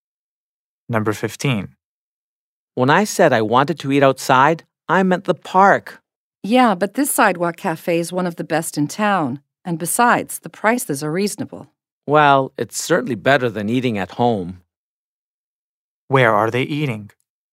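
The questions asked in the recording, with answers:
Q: Where are they eating?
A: At a sidewalk cafe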